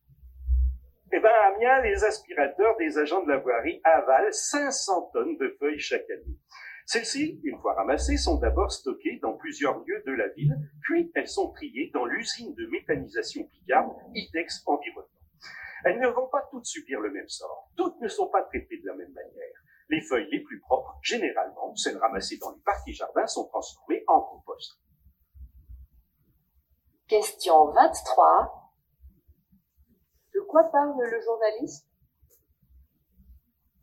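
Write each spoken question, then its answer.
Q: De quoi parle le journaliste?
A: Du ramassage et du traitement (recyclage) des feuilles mortes à Amiens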